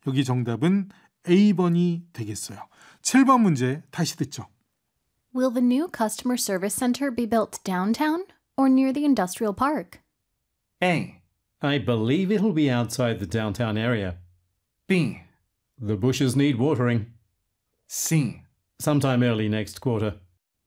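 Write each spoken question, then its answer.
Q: Will the new customer service center be built downtown or near the industrial park?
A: A: I believe it'll be outside the downtown area.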